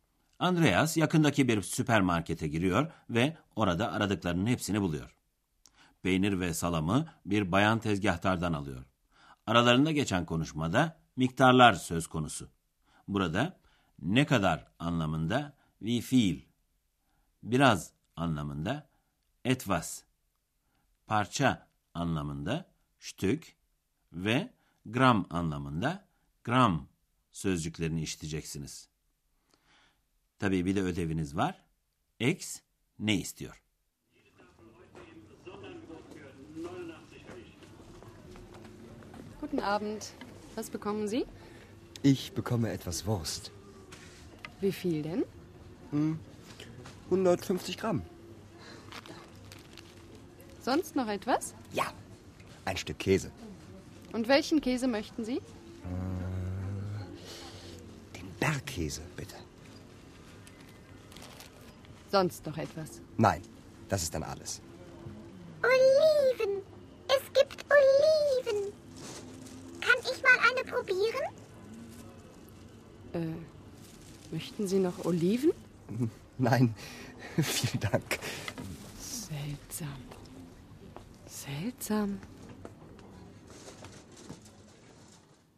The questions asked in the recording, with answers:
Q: X ne istiyor?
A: Bir tane zeytinin tadına bakmak istedi.